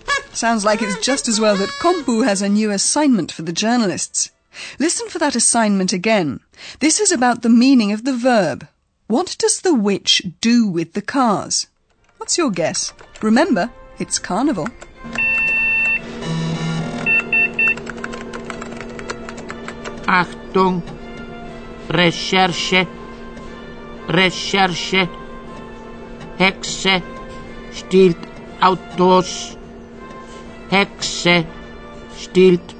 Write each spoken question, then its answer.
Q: What does the witch do with the cars?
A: This witch is exploiting the carnival fancy dress to steal cars.